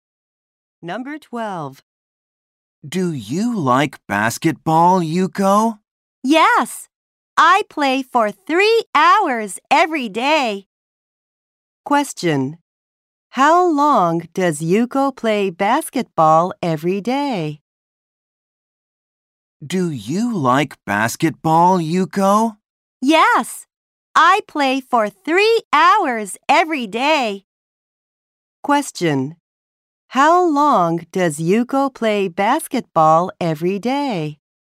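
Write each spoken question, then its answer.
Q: How long does Yuko play basketball every day?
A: For 3 hours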